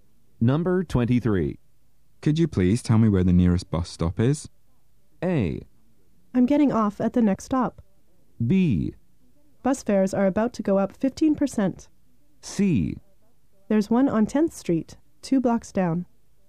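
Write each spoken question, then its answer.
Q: Could you please tell me where the nearest bus stop is?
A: C: There's one on 10th Street, 2 blocks down.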